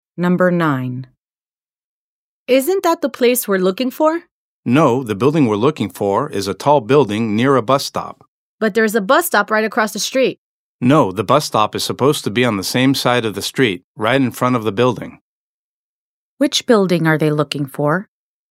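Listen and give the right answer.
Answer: A tall building with a bus stop right in front of it, on the same side of the street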